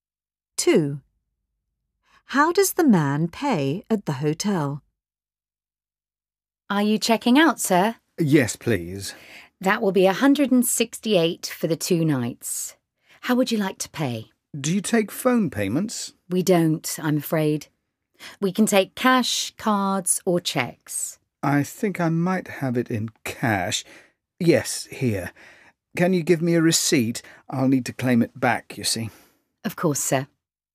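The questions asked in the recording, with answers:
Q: How does the man pay at the hotel?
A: In cash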